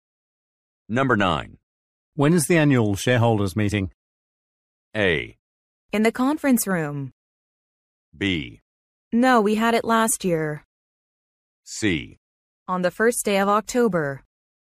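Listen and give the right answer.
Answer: C: On the first day of October.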